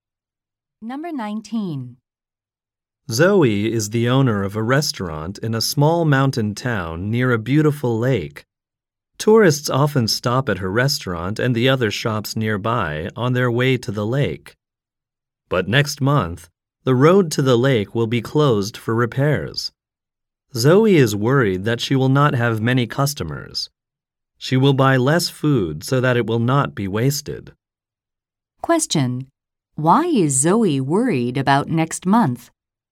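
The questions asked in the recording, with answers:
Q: Why is Zoe worried about next month?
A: The road to the lake will be closed, so she may have few customers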